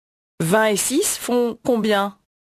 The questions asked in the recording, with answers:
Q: 20 et 6 font combien?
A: 26.